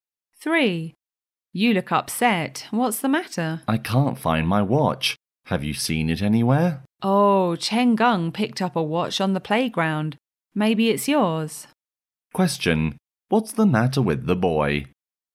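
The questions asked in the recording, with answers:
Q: What's the matter with the boy?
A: He can't find his watch.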